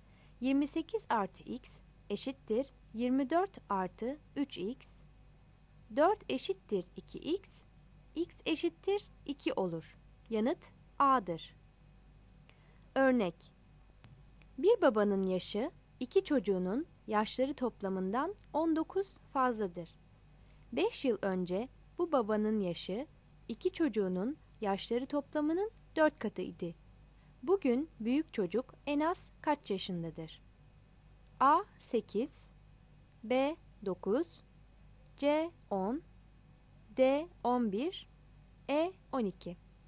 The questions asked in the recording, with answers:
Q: Bugün büyük çocuk en az kaç yaşındadır?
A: Yanıt C'dir.